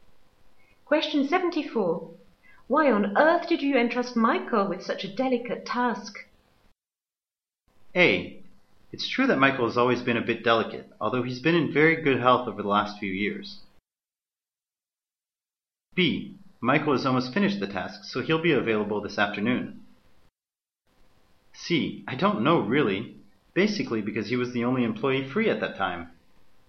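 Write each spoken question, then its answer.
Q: Why on earth did you entrust Michael with such a delicate task?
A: C: I don't know, really. Basically, because he was the only employee free at that time.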